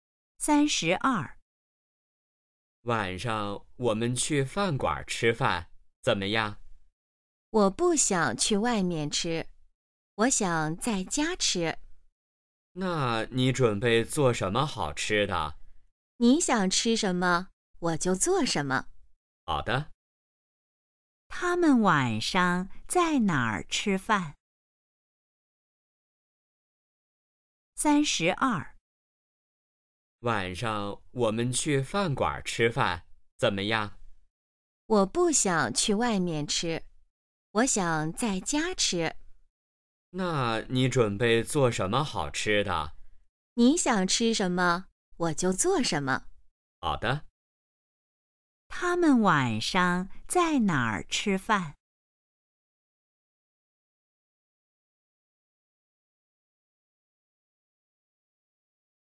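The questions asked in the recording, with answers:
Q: 他们晚上在哪儿吃饭?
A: 在家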